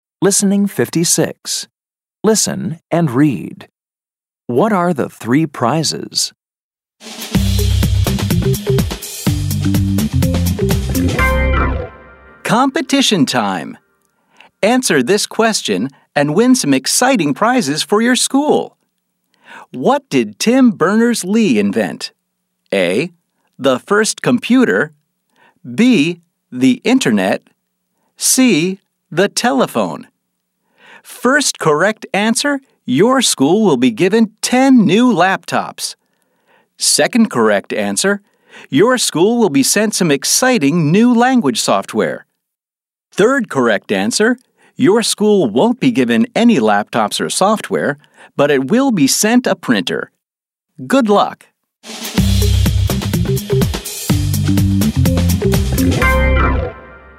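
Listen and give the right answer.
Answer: 10 new laptops, some new language software, and a printer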